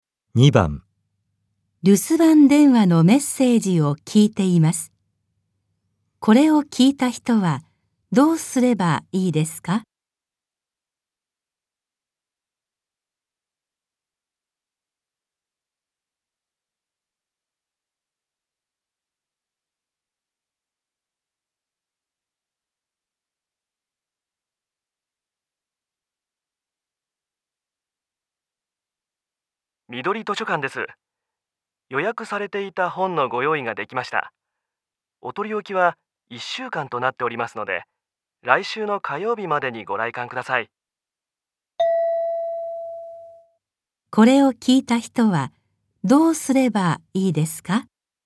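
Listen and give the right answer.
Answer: 来週の火曜日までに図書館へ予約した本を取りに行く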